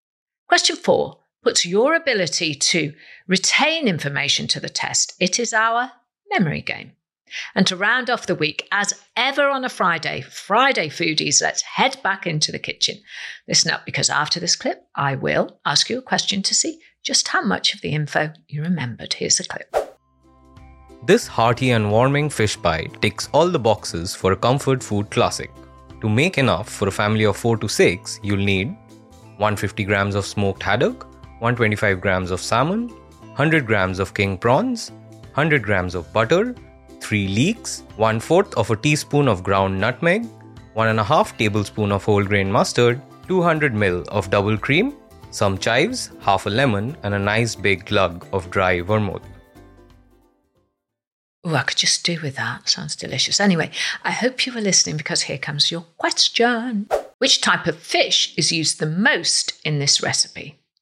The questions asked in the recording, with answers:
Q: Which type of fish is used the most in this recipe?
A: And the answer in the clip was haddock or smoked haddock.